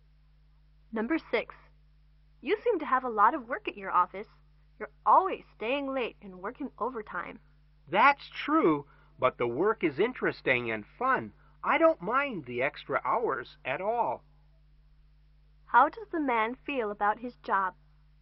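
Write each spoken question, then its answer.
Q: How does the man feel about his job?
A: He enjoys it and doesn't mind the overtime.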